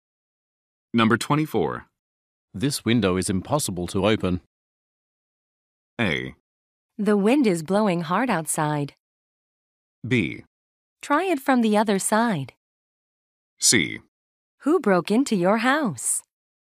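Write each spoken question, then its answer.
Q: This window is impossible to open.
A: B: Try it from the other side.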